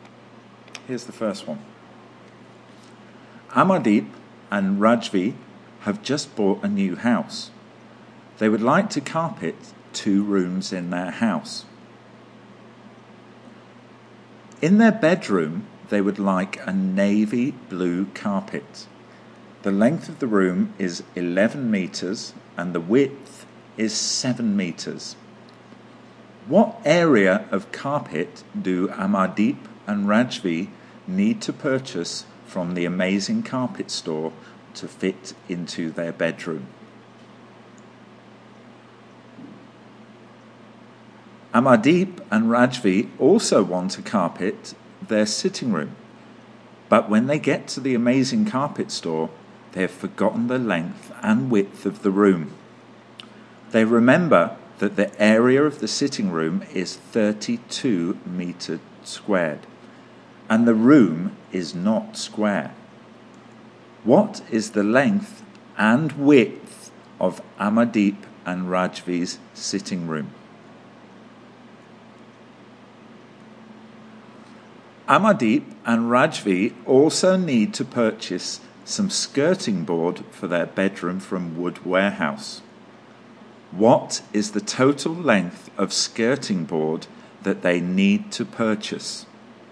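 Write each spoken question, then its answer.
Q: What area of carpet do Amardeep and Rajvi need to purchase from the Amazing Carpet Store to fit into their bedroom?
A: 77 square metres

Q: What is the total length of skirting board that they need to purchase?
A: 36 metres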